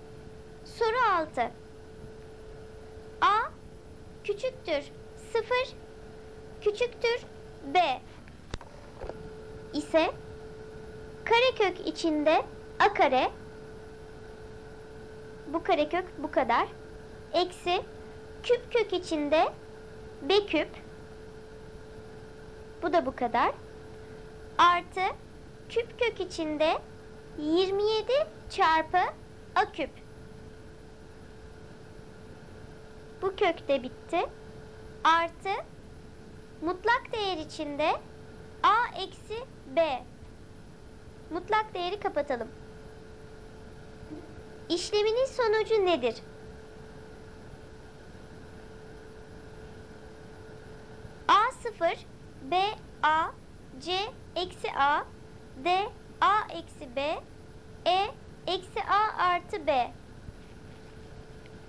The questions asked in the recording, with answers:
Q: Mutlak değeri kapatalım. İşleminin sonucu nedir?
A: Doğru cevap B seçeneği A.